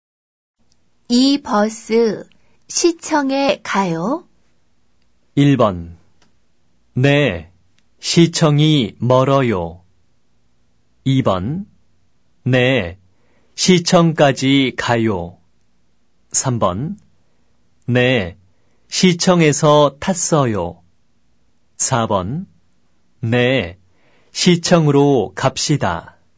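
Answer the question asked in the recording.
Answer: 2번: 네, 시청까지 가요.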